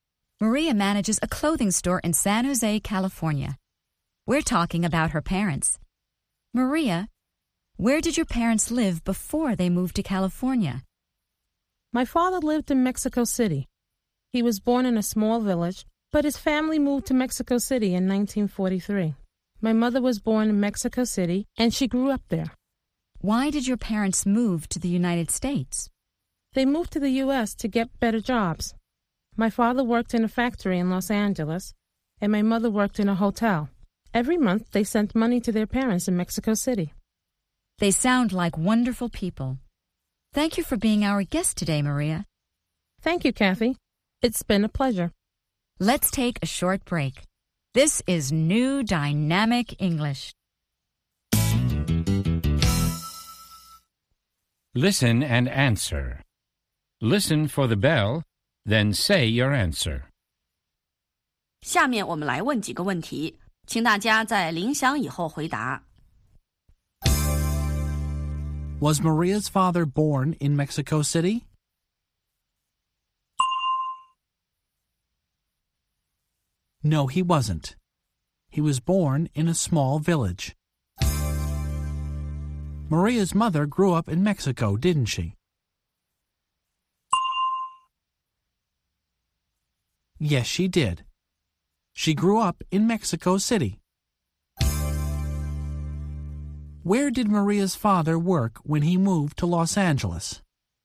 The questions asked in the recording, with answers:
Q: Was Maria's father born in Mexico City?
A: No, he wasn't. He was born in a small village.

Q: Where did Maria's father work when he moved to Los Angeles?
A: He worked in a factory.